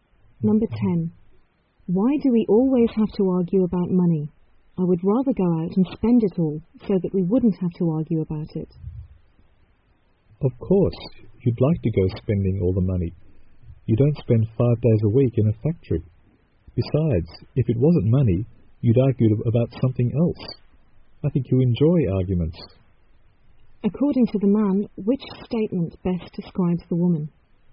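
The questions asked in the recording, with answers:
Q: According to the man, which statement best describes the woman?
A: She enjoys arguing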